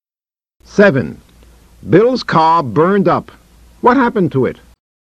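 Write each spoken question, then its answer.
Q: What happened to it?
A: It burned up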